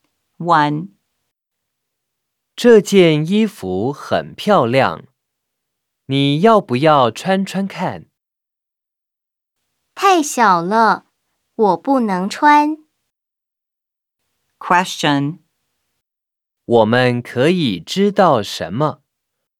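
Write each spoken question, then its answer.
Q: 我们可以知道什么?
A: 这件衣服太小了,他/她不能穿。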